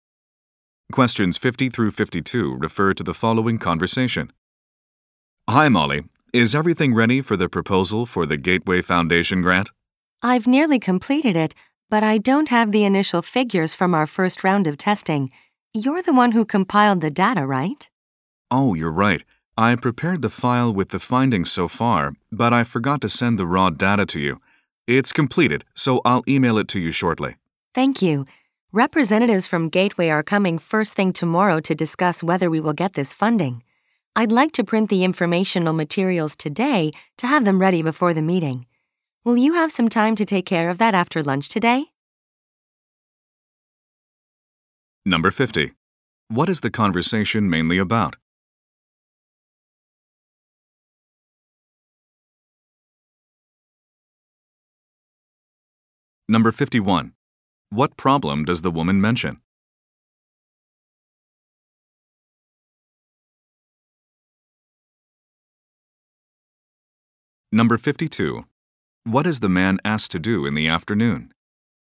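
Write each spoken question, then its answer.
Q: What is the conversation mainly about?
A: A grant proposal

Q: What problem does the woman mention?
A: She doesn't have the initial test figures

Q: What is the man asked to do in the afternoon?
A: Print informational materials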